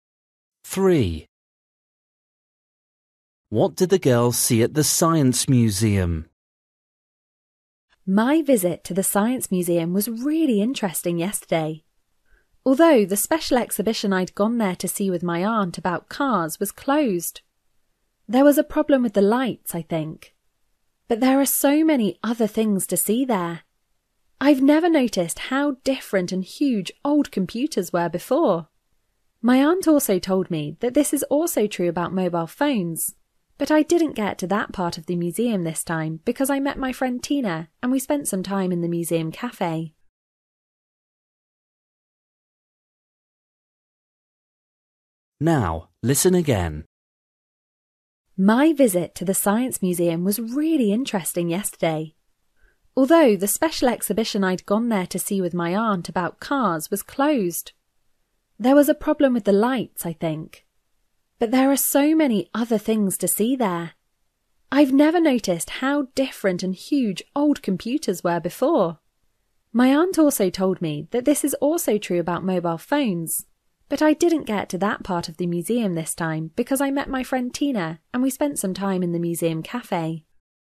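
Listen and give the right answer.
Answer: old computers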